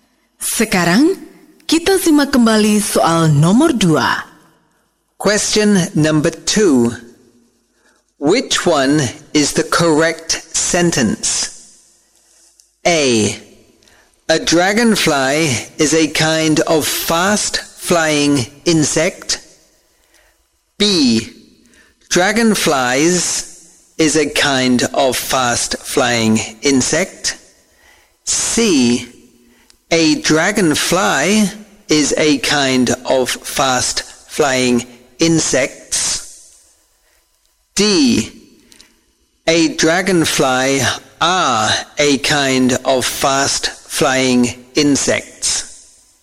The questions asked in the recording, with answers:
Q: Which one is the correct sentence?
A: A. A dragonfly is a kind of fast-flying insect.